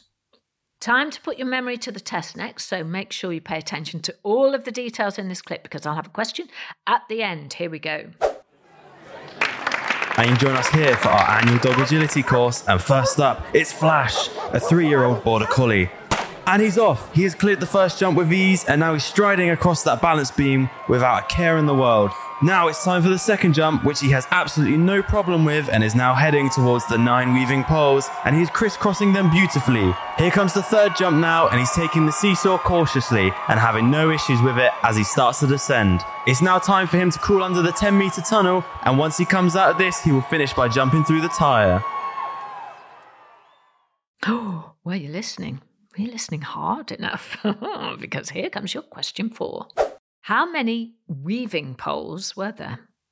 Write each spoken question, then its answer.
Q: How many weaving poles were there?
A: The answer was 9 weaving poles.